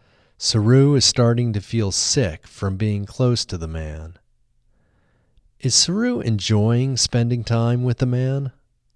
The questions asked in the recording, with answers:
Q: Is Saru enjoying spending time with the man?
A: No, Saru isn't enjoying spending time with the man.